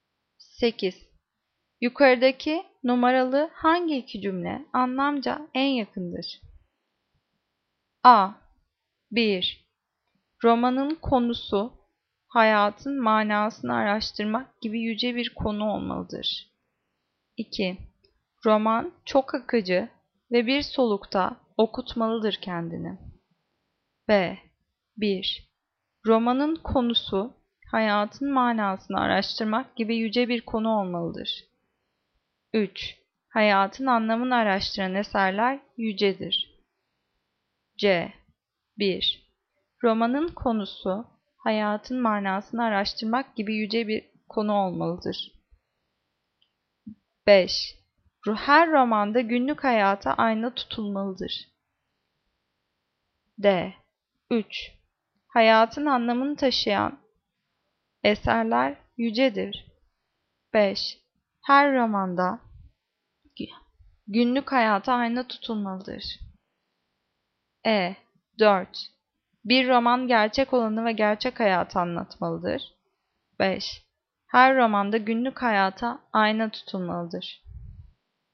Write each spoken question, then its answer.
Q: Yukarıdaki numaralı hangi iki cümle anlamca en yakındır?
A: Cevap B. 1. Romanın konusu hayatın manasını araştırmak gibi yüce bir konu olmalıdır.